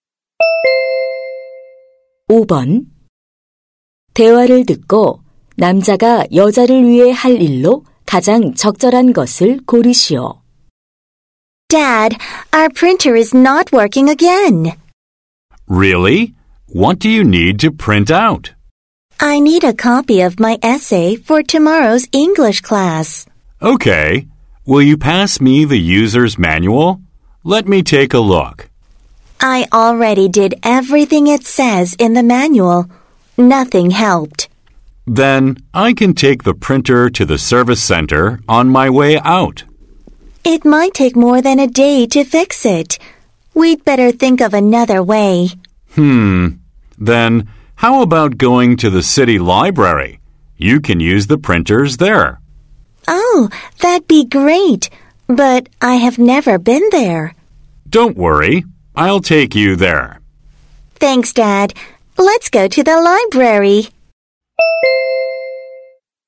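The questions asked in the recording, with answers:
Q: 대화를 듣고 남자가 여자를 위해 할 일로 가장 적절한 것을 고르시오.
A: 시립 도서관에 데려다주기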